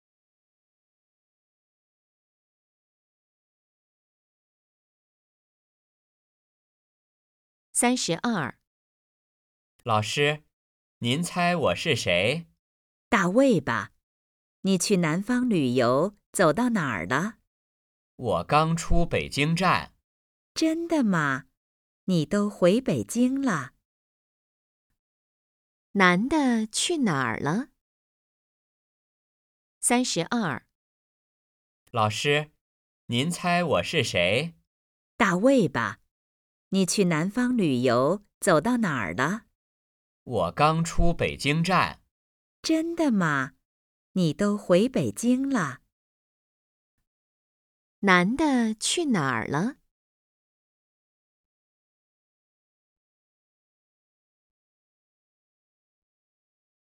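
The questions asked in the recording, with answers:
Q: 男的去哪儿了?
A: 去南方旅游了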